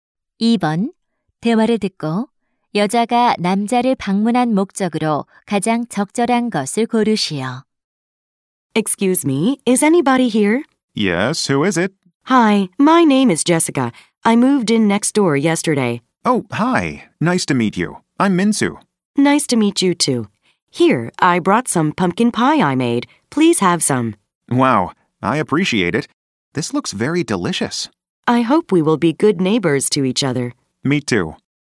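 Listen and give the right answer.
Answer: 새 이웃으로 인사하고 호박 파이를 주려고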